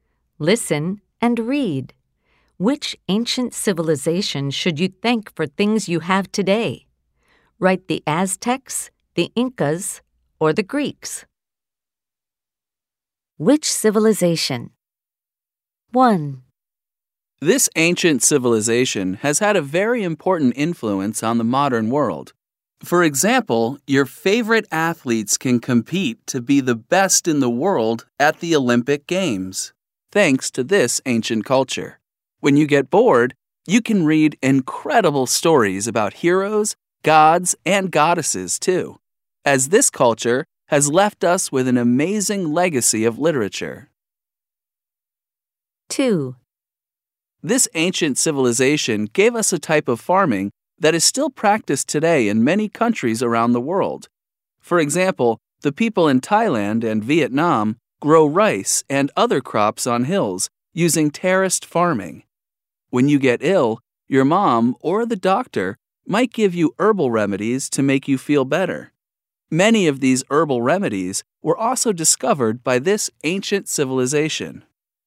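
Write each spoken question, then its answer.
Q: Which civilization? 1.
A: the Greeks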